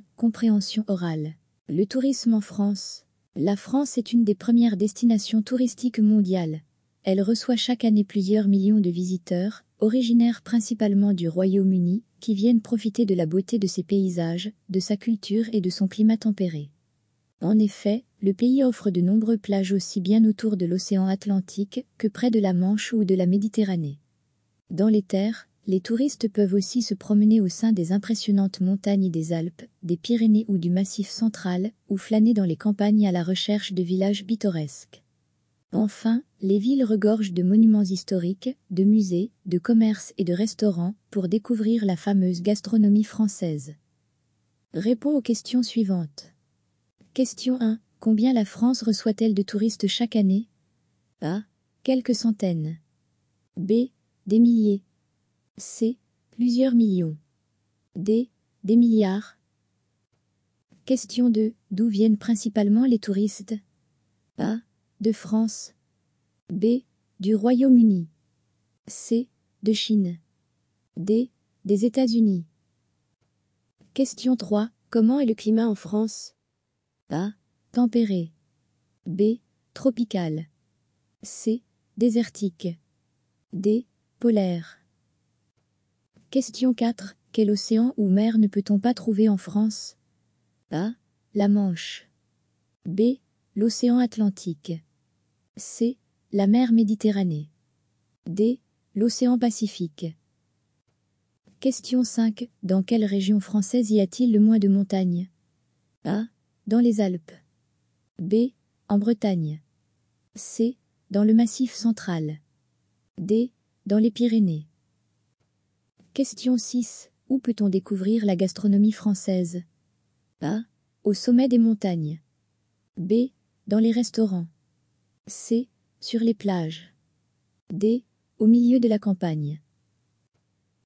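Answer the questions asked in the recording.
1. C: Plusieurs millions.
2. B: Du Royaume-Uni.
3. A: Tempéré.
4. D: L'océan Pacifique.
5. B: En Bretagne.
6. B: Dans les restaurants.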